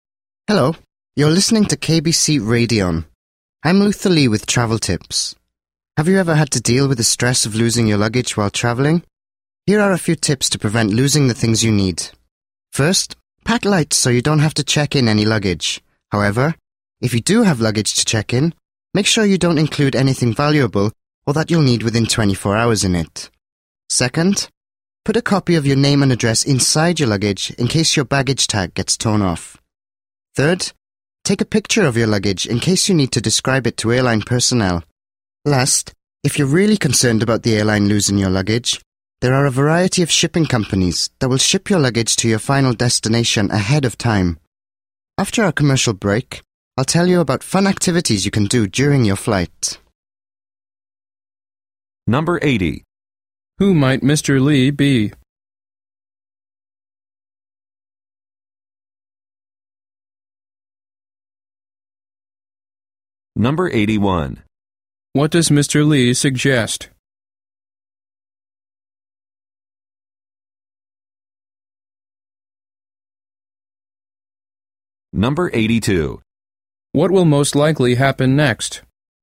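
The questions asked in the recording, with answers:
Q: Who might Mr. Lee be?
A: A radio host giving travel tips

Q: What will most likely happen next?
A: A commercial break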